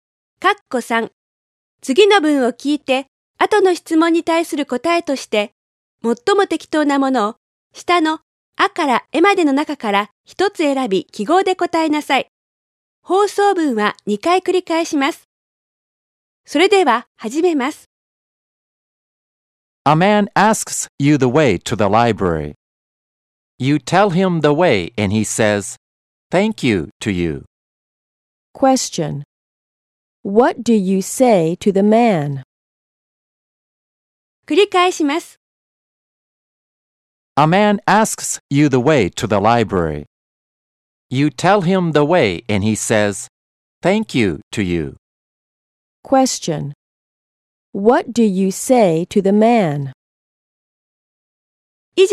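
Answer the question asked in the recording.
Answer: You're welcome.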